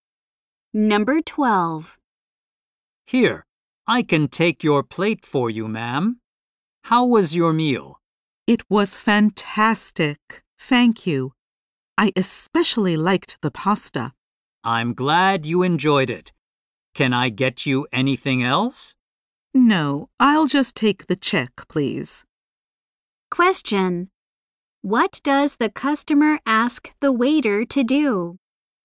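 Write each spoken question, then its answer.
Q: What does the customer ask the waiter to do?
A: Bring the check.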